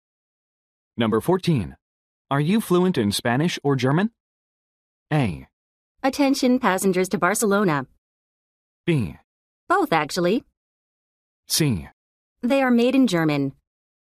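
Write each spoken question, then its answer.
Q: Are you fluent in Spanish or German?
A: B: Both, actually.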